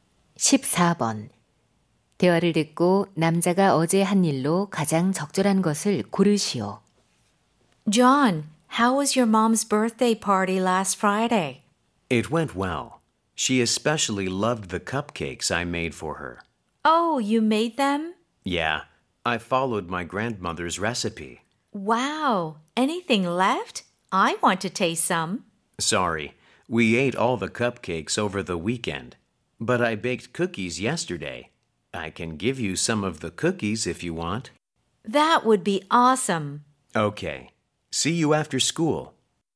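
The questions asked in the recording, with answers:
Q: 대화를 듣고 남자가 어제 한 일로 가장 적절한 것을 고르시오.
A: 쿠키 굽기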